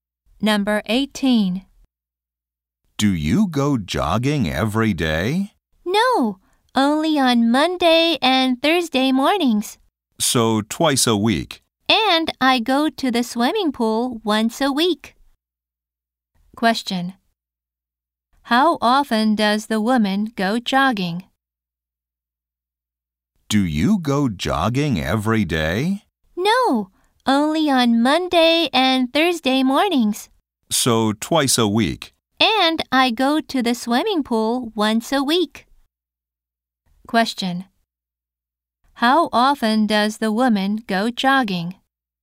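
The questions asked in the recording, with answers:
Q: Question. How often does the woman go jogging?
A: Twice a week.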